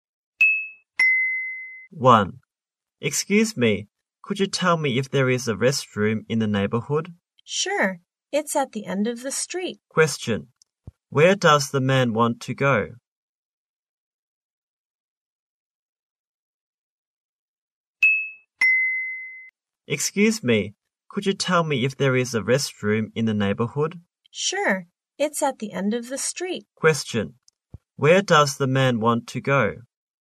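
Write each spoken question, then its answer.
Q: Where does the man want to go?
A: A restroom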